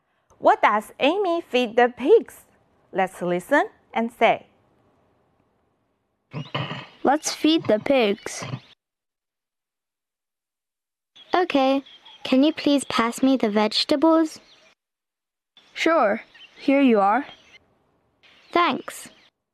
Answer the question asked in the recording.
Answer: She feeds them with vegetables.